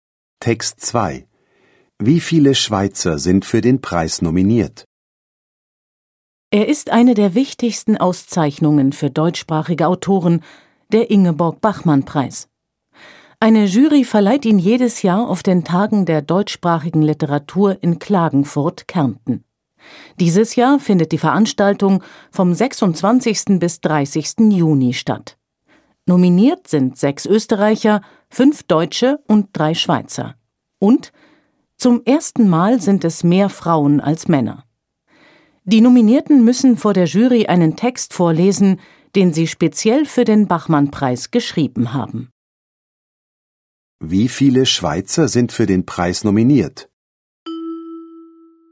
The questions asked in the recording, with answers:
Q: Wie viele Schweizer sind für den Preis nominiert?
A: 3 Schweizer sind für den Preis nominiert.